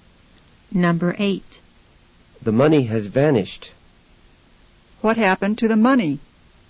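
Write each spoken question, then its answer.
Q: What happened to the money?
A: It disappeared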